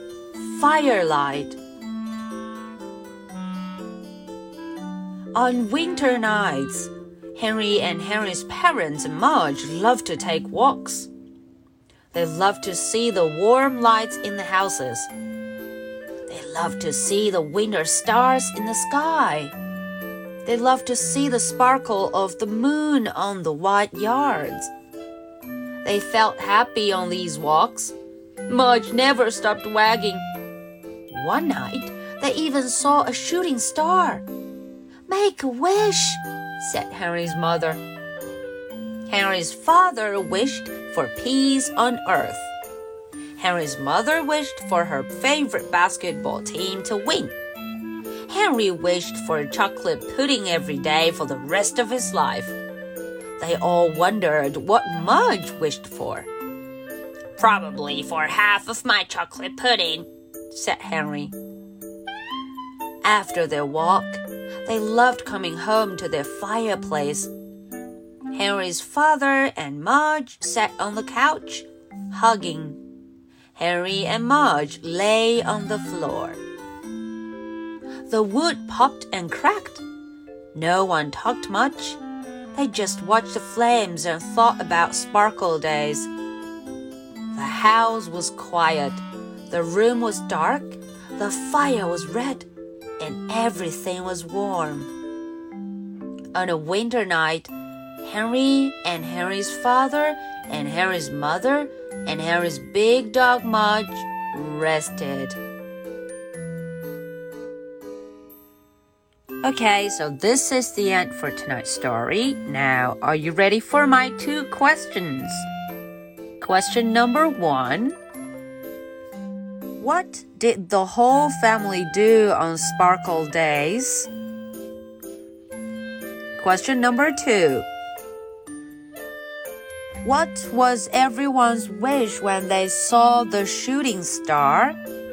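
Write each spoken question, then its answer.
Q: what was everyone's wish when they saw the shooting star?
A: Father: peace on earth; mother: her favorite basketball team to win; Henry: chocolate pudding every day for the rest of his life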